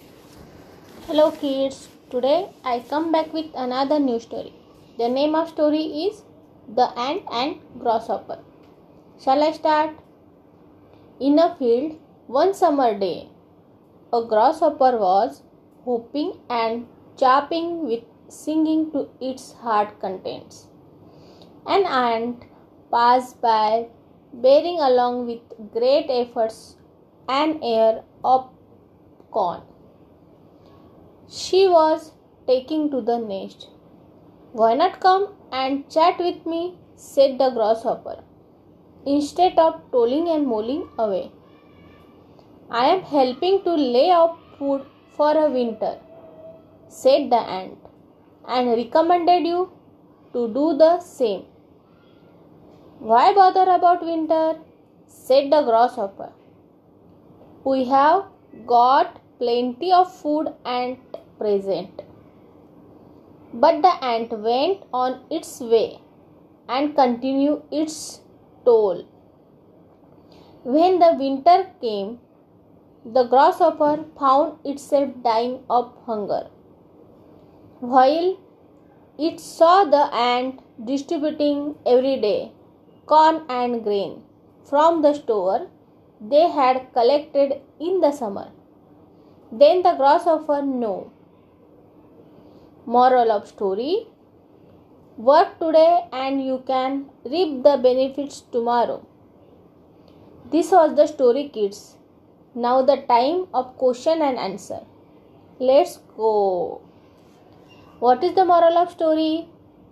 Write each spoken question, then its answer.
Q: What is the moral of story?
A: Work today and you can reap the benefits tomorrow.